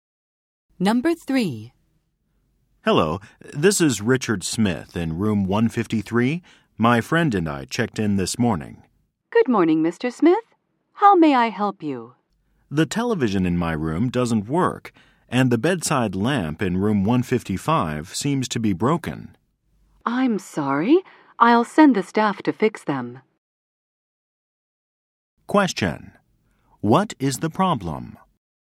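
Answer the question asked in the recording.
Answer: The television in his room doesn't work and the bedside lamp in room 155 is broken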